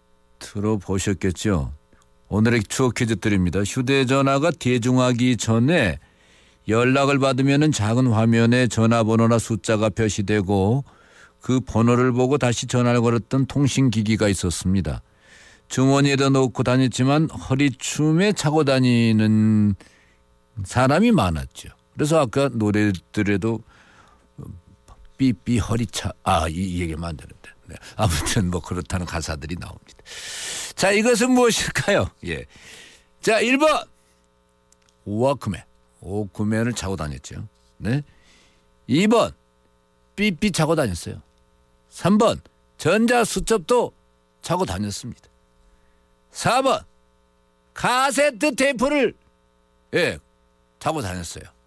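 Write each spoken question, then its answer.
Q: 자, 이것은 무엇일까요?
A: 2번: 삐삐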